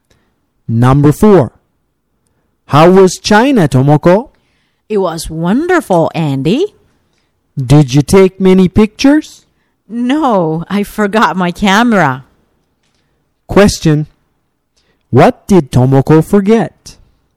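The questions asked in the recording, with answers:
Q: Question, what did Tomoko forget?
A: Her camera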